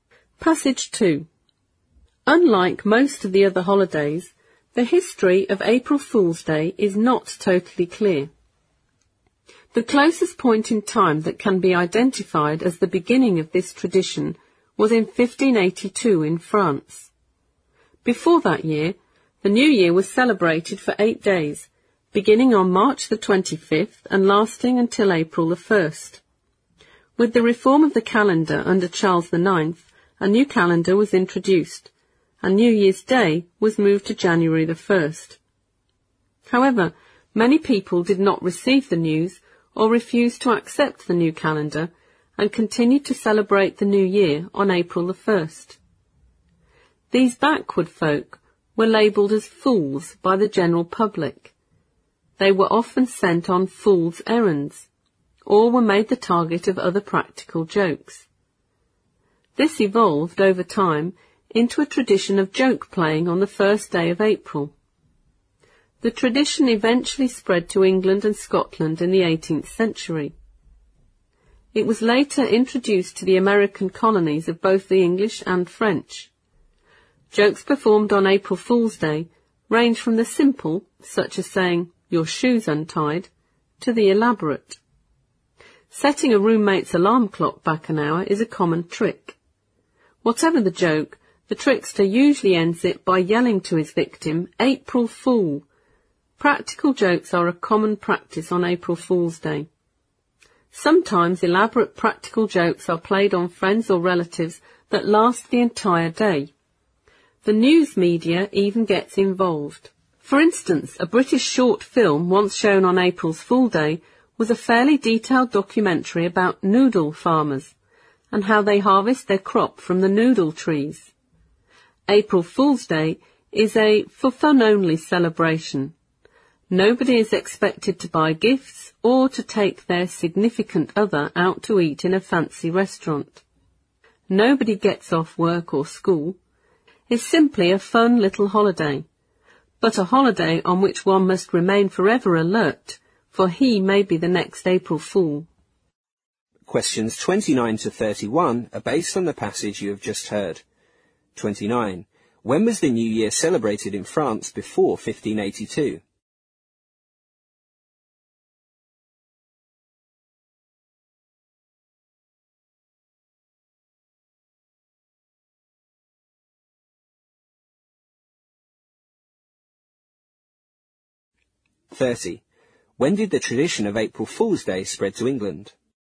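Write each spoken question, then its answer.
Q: When was the New Year celebrated in France before 1582?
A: For 8 days, from March 25 to April 1

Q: When did the tradition of April Fool's Day spread to England?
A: In the 18th century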